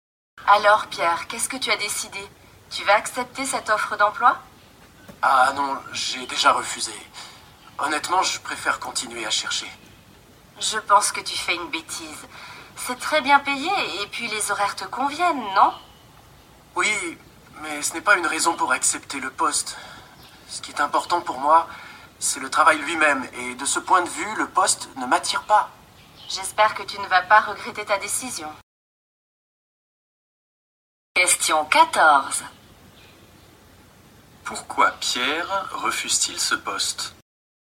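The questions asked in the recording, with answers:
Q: Pourquoi Pierre refuse-t-il ce poste?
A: Le travail lui-même ne l'attire pas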